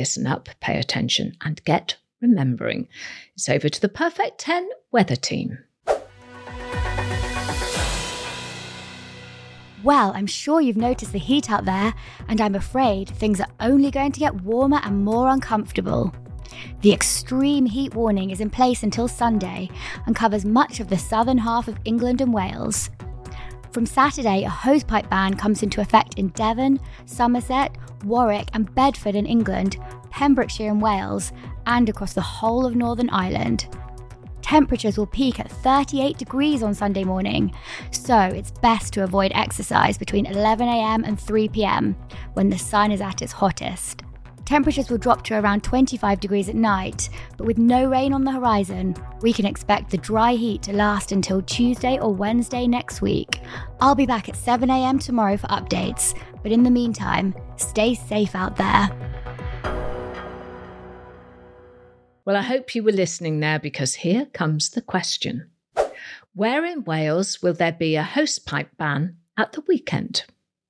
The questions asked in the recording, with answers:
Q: Where in Wales will there be a hosepipe ban at the weekend?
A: Well, the answer was Pembrokeshire.